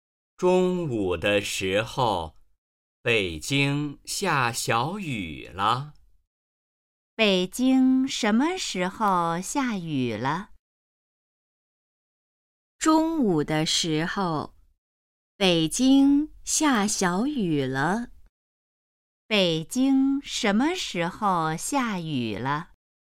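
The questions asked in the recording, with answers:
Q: 北京什么时候下雨了?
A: 中午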